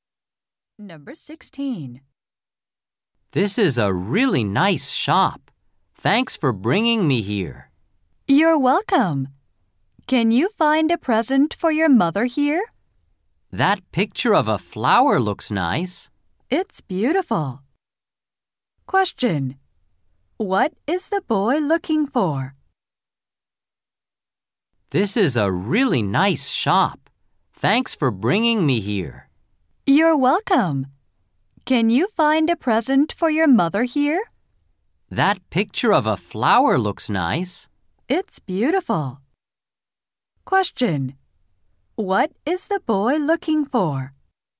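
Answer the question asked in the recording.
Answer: A present for his mother.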